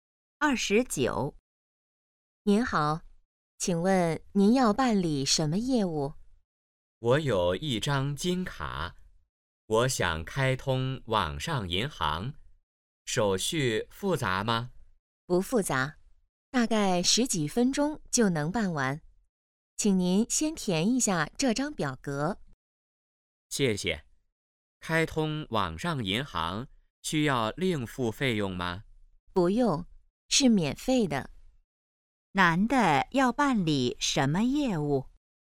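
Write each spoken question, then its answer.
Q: 男的要办理什么业务?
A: 开通网上银行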